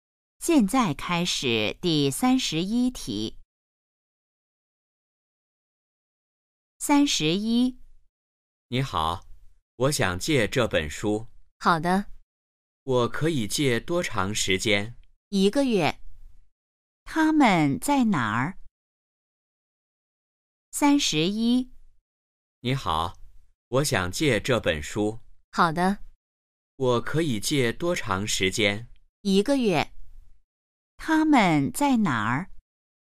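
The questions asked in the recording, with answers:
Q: 他们在哪儿?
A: 图书馆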